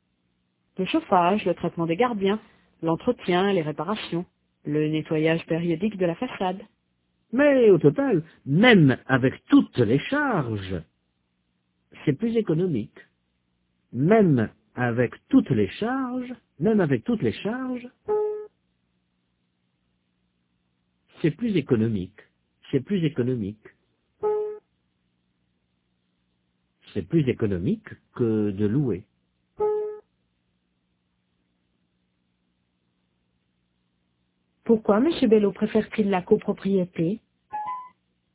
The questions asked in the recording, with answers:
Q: Pourquoi M. Bello préfère-t-il la copropriété?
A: Parce que même avec toutes les charges, c'est plus économique que de louer.